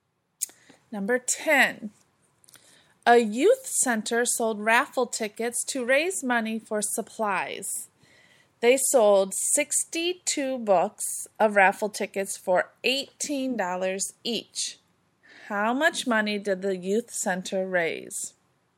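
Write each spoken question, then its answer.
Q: How much money did the youth center raise?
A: $1,116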